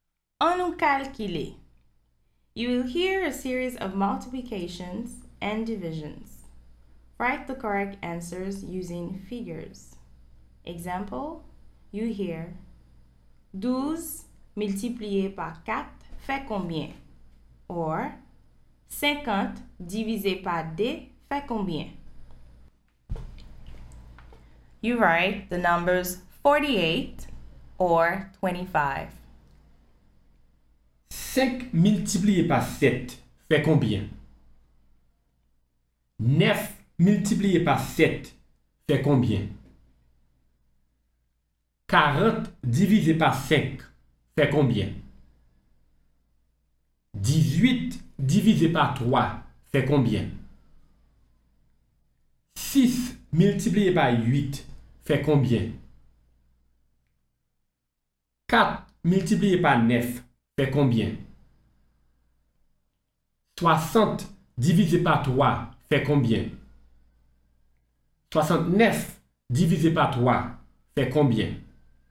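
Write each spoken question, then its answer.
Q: 5 multiplié par 7 fait combien?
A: 35

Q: 9 multiplié par 7 fait combien?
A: 63

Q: 6 multiplié par 8 fait combien?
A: 48

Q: 4 multiplié par 9 fait combien?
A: 36

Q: 60 divisé par 3 fait combien?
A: 20

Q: 69 divisé par 3 fait combien?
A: 23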